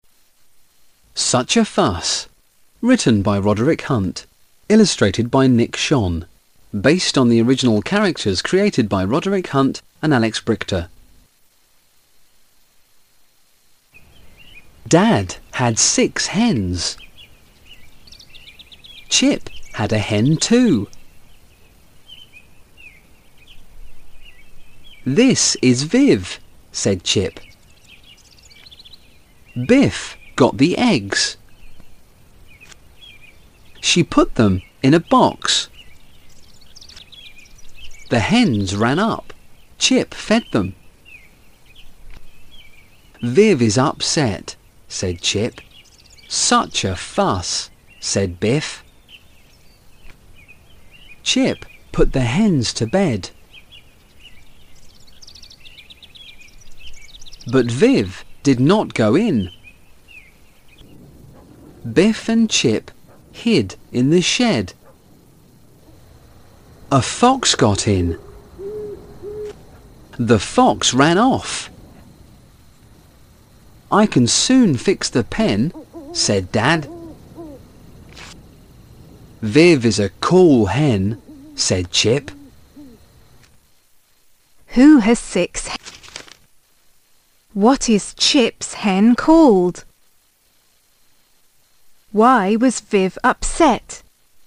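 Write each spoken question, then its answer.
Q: Who has six?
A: Dad (he had six hens)

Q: What is Chip's hen called?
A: Viv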